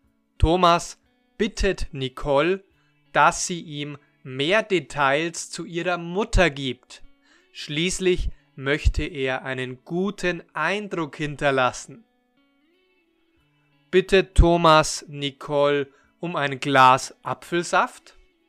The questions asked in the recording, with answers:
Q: Bitte Thomas Nicole um ein Glas Apfelsaft.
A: Nein, Thomas bittet Nicole nicht um ein Glas Apfelsaft.